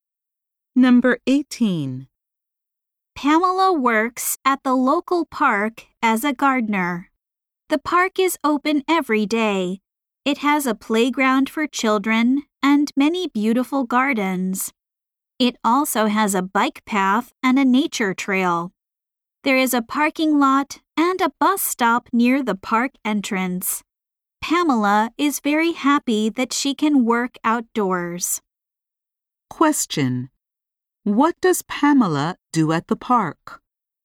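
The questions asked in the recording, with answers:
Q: What does Pamela do at the park?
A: She works as a gardener.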